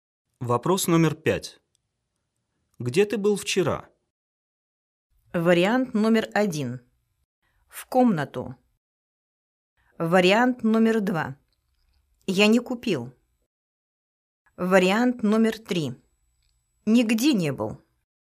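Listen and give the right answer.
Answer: 3: Нигде не был.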